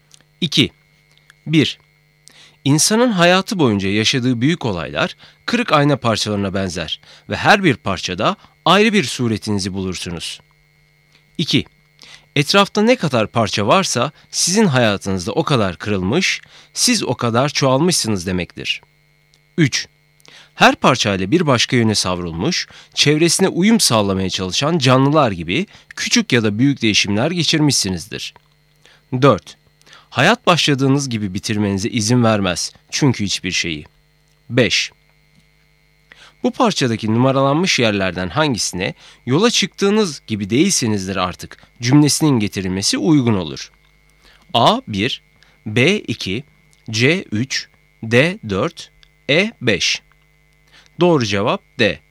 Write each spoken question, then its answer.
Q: Bu parçadaki numaralanmış yerlerden hangisine "yola çıktığınız gibi değilsinizdir artık" cümlesinin getirilmesi uygun olur.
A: Doğru cevap D.